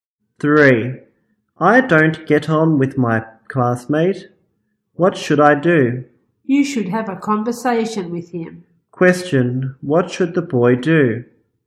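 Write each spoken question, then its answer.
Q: what should the boy do?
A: Have a conversation with his classmate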